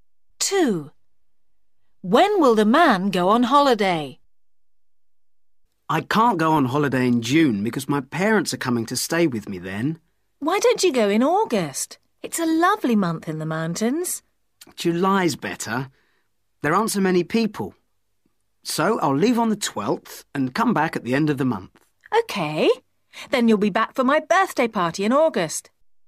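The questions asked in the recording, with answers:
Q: When will the man go on holiday?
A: In July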